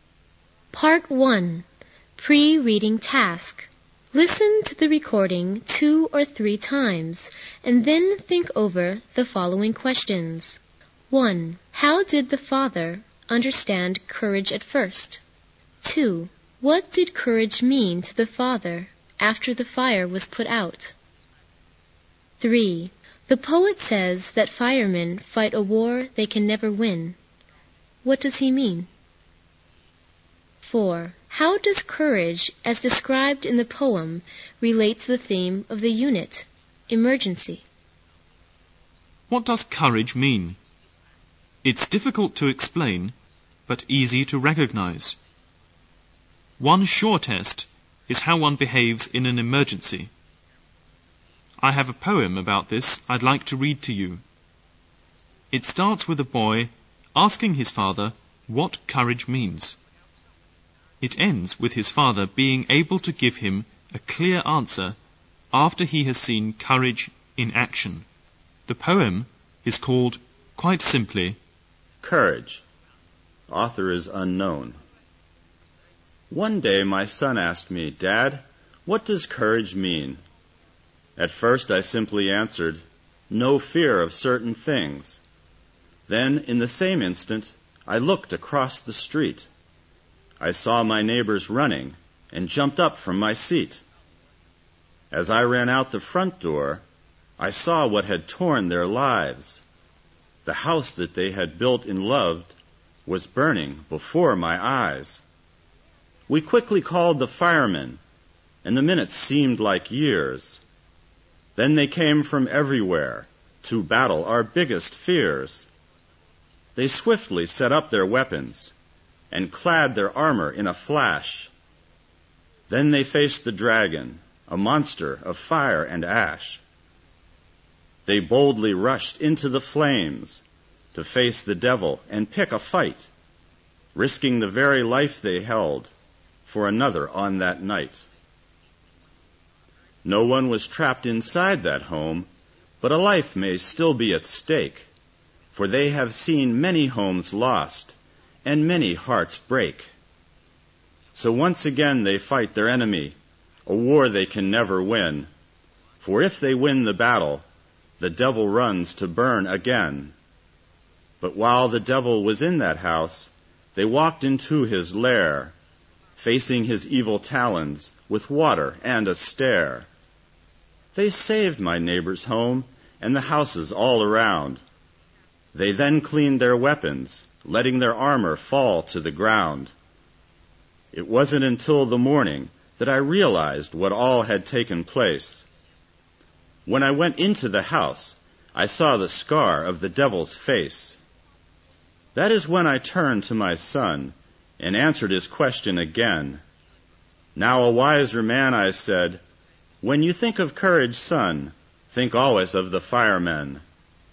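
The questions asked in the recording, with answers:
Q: How did the father understand courage at first?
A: As having no fear of certain things

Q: What did courage mean to the father after the fire was put out?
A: Courage meant the firemen, who risk their lives to save others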